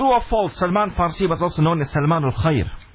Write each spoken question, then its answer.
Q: True or false, Salman Farsi was also known as Salman al-Khair.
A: The answer there is true.